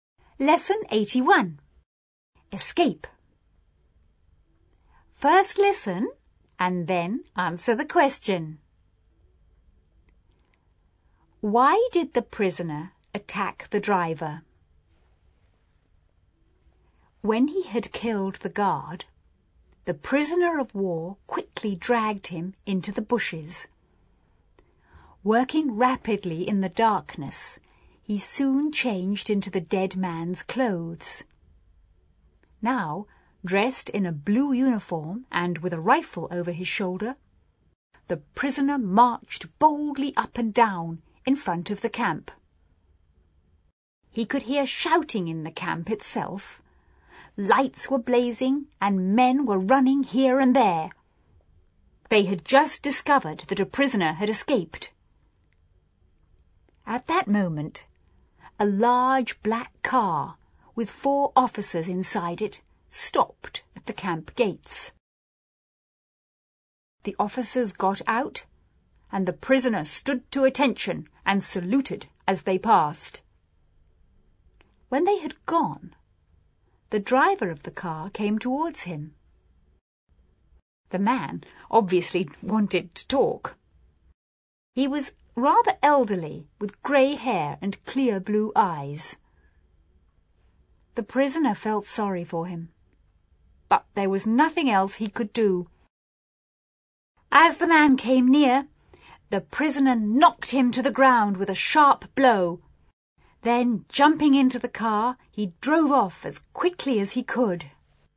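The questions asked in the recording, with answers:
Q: Why did the prisoner attack the driver?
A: So he could take the car and escape.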